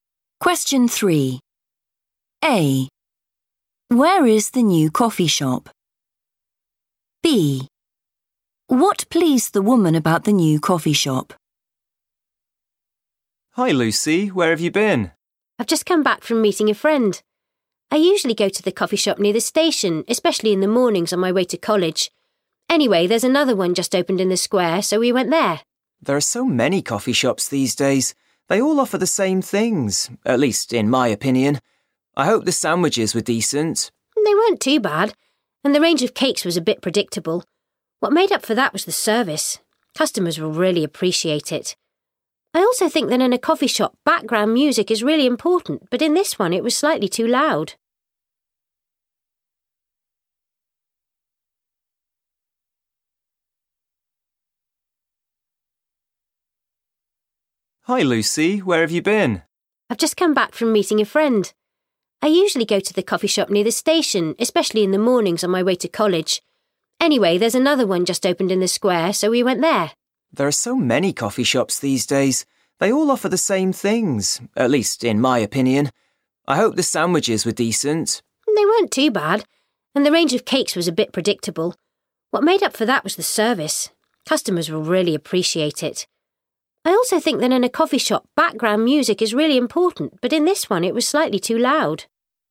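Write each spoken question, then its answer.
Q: Where is the new coffee shop?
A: in the square

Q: What pleased the woman about the new coffee shop?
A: the service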